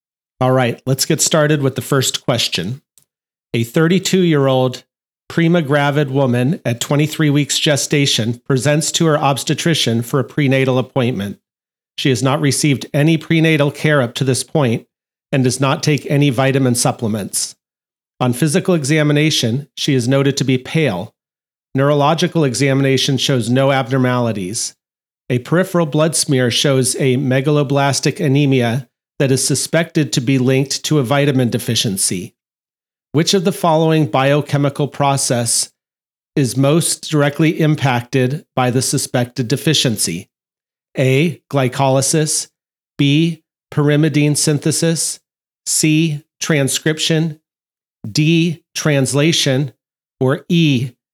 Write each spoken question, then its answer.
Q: Which of the following biochemical process is most directly impacted by the suspected deficiency?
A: The correct answer is B.